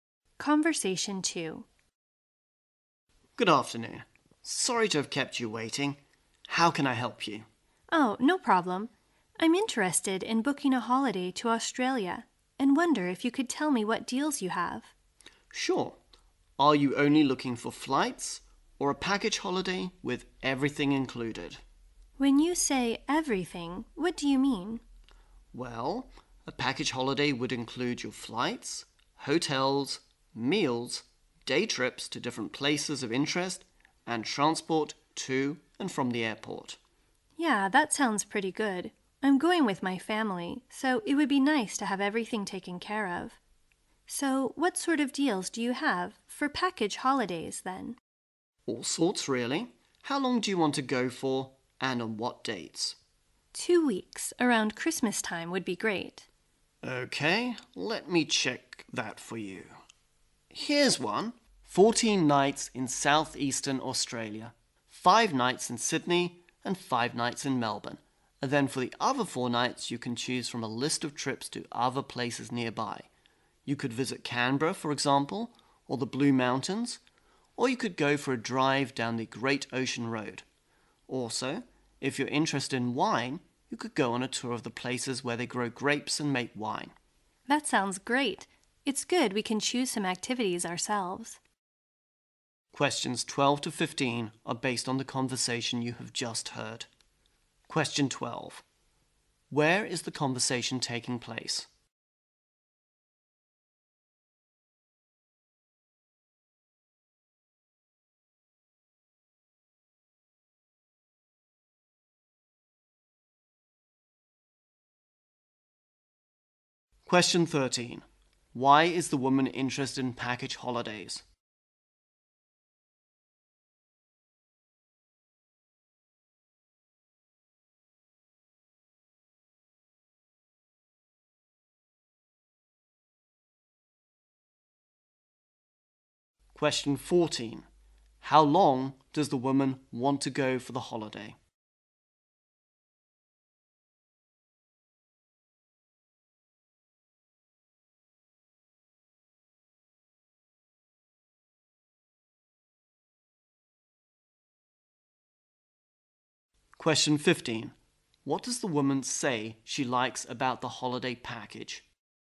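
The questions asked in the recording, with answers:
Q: Where is the conversation taking place?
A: At a travel agency

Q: Why is the woman interested in package holidays?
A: She's going with her family and wants everything taken care of

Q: How long does the woman want to go for the holiday?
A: Two weeks

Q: What does the woman say she likes about the holiday package?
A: They can choose some activities themselves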